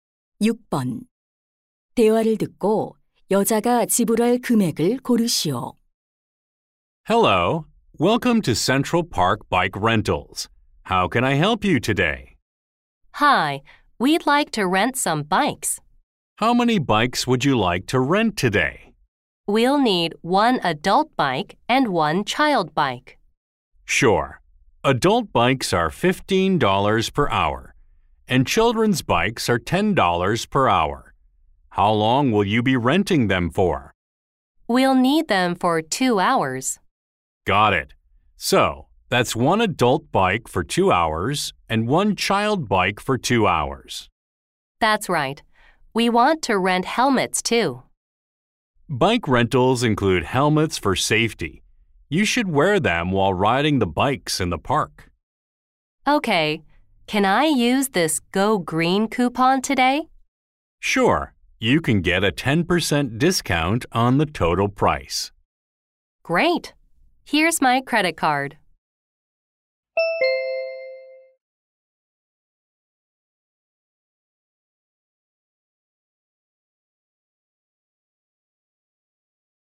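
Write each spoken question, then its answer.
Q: 대화를 듣고 여자가 지불할 금액을 고르시오.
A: 45달러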